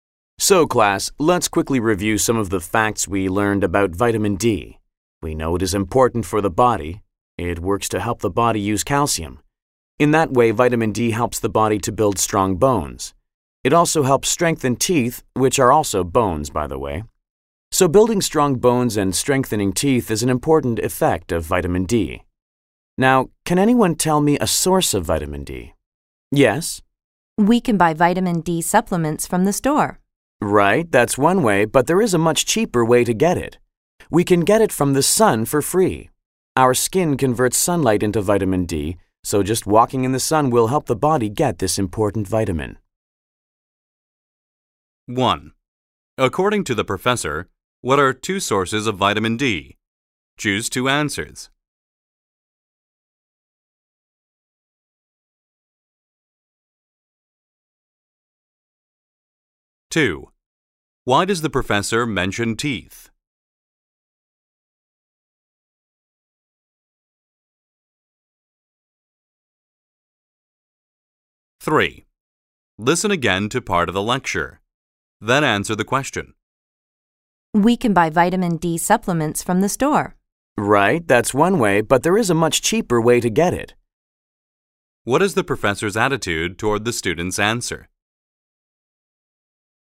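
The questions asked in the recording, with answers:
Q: According to the professor, what are two sources of vitamin D?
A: Vitamin D supplements from the store and sunlight

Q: Why does the professor mention teeth?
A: To show that vitamin D strengthens teeth, which are also bones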